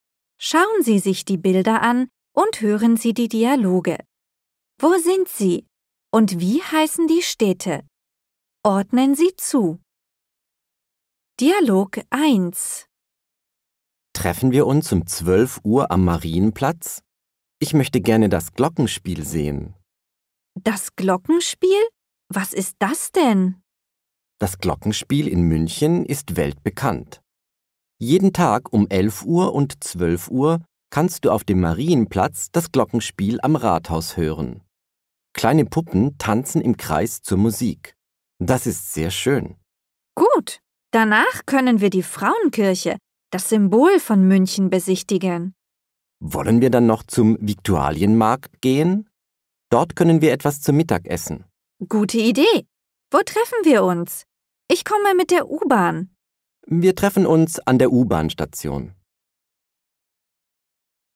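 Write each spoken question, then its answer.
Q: Und wie heißen die Städte?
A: München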